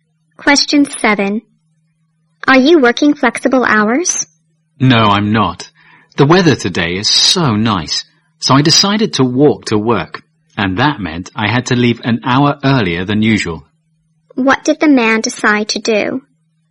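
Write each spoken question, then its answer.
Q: What did the man decide to do?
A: Walk to work.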